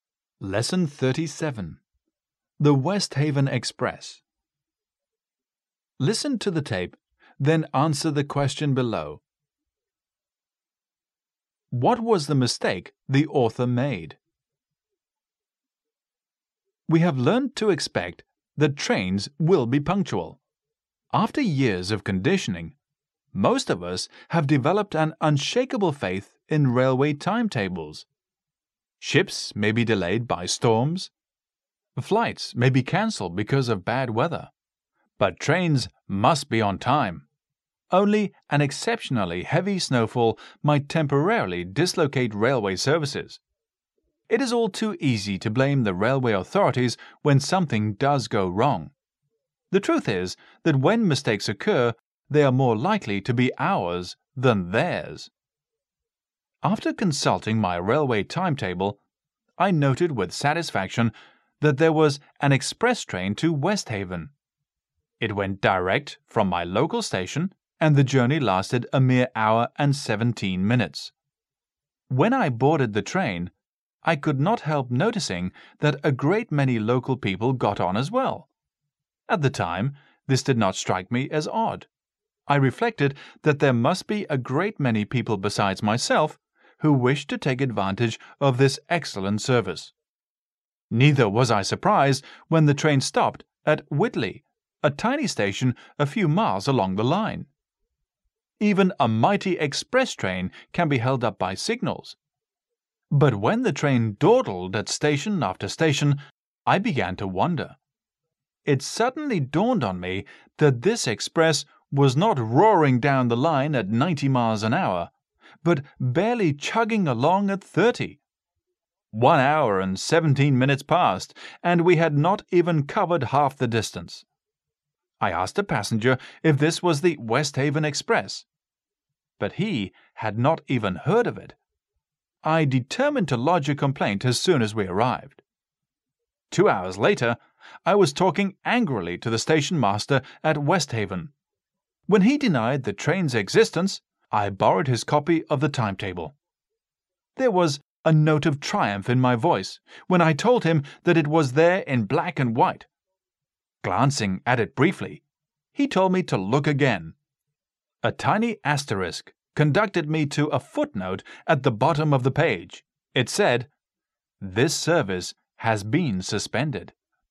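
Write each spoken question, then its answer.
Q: What was the mistake the author made?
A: He didn't notice the footnote saying the express service had been suspended, so he caught a slow train.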